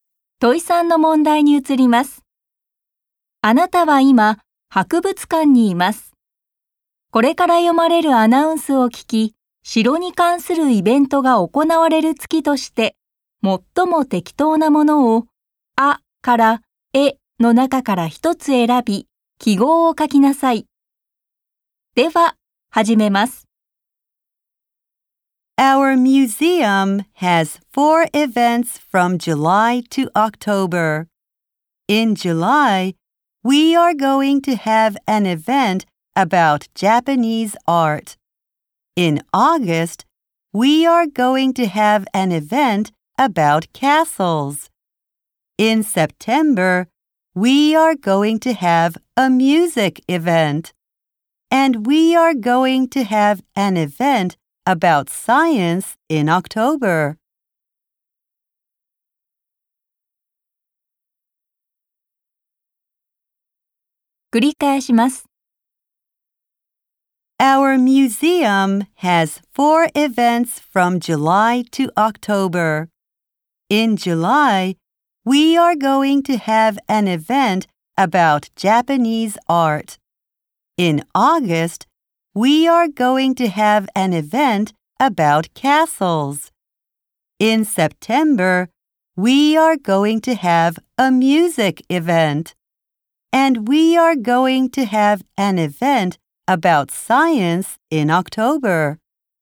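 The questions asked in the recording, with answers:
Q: 城に関するイベントが行われる月として、最も適当なものを、あから、えの中から一つ選び、記号を書きなさい。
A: 8月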